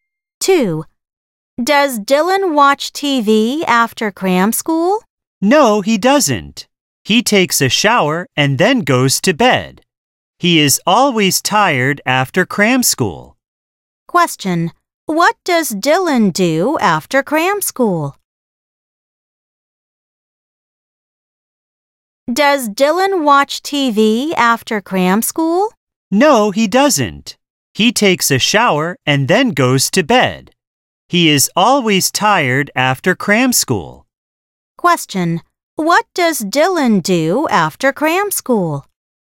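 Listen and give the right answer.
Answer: He takes a shower and then goes to bed.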